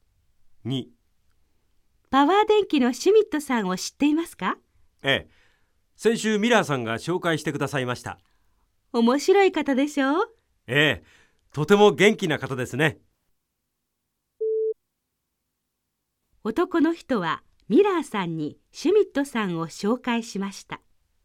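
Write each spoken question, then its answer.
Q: 男の人はミラーさんにシュミットさんを紹介しました。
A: ×(ミラーさんが紹介した)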